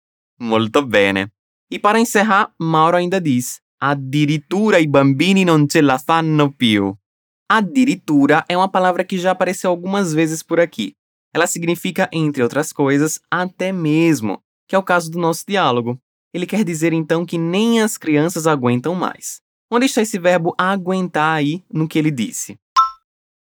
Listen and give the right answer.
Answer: Non ce la fanno più. Temos o nosso importante verbo farcela